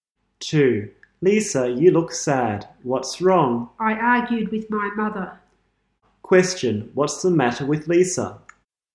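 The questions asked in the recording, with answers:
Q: Question, what's the matter with Lisa?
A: She argued with her mother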